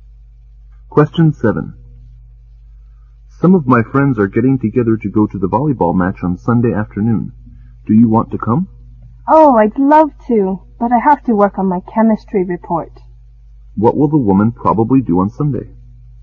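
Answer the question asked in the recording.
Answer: Work on her chemistry report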